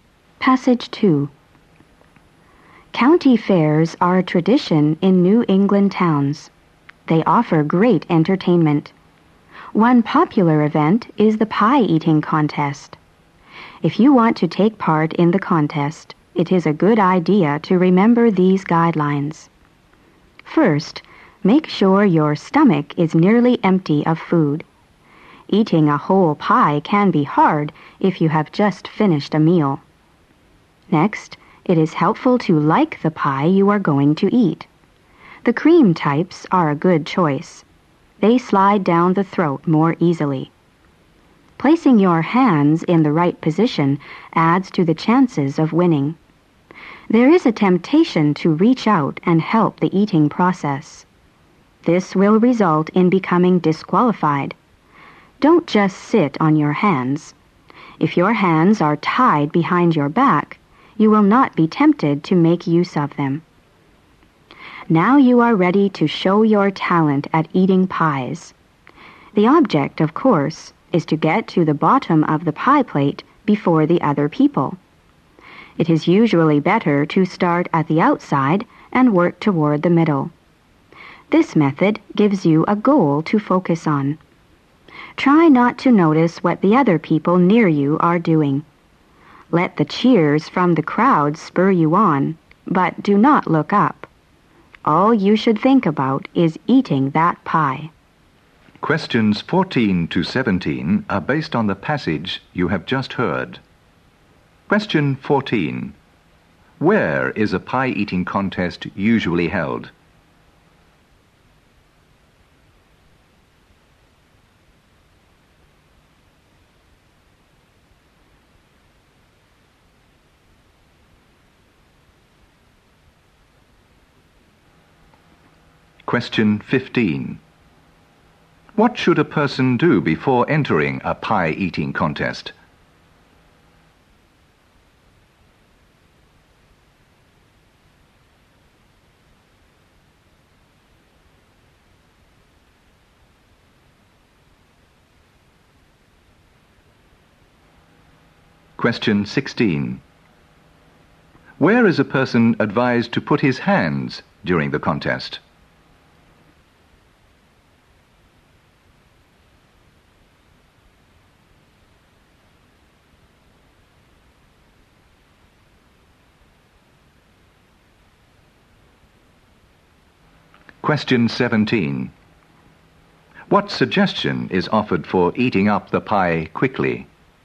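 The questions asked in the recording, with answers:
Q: Where is a pie-eating contest usually held?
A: At county fairs in New England towns

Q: What should a person do before entering a pie-eating contest?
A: Make sure their stomach is nearly empty

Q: Where is a person advised to put his hands during the contest?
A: Tied behind his back

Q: What suggestion is offered for eating up the pie quickly?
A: Start at the outside and work toward the middle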